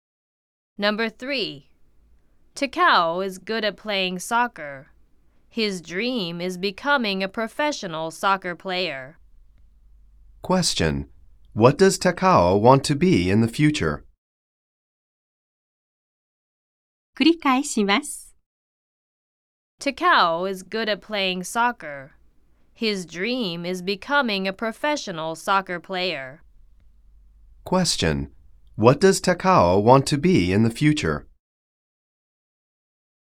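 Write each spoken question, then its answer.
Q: What does Takao want to be in the future?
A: A professional soccer player.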